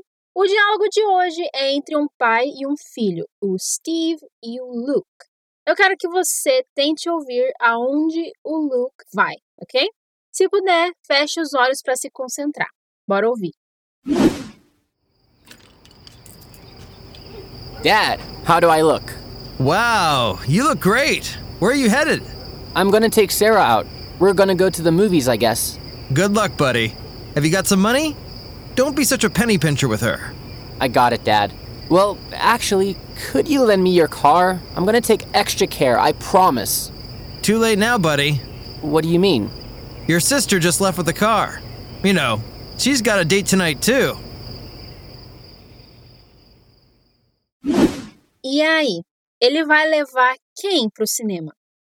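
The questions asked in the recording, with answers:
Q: Eu quero que você tente ouvir aonde o Luke vai, ok?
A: Ao cinema

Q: E aí? Ele vai levar quem pro cinema?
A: A Sarah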